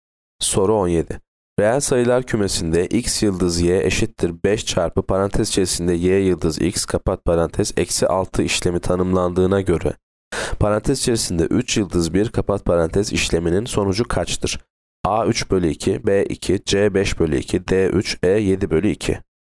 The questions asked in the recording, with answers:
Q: Reel sayılar kümesinde x yıldız y eşittir 5 çarpı parantez içerisinde y yıldız x kapat parantez eksi 6 işlemi tanımlandığına göre parantez içerisinde 3 yıldız 1 kapat parantez işleminin sonucu kaçtır?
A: Yanıt A 3 bölü 2.